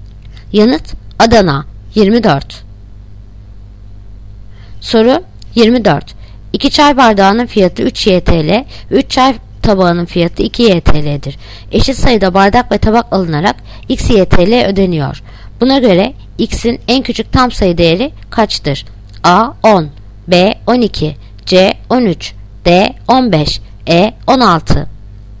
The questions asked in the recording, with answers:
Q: Buna göre X'in en küçük tam sayı değeri kaçtır?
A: Yanıt Ceyhan 13.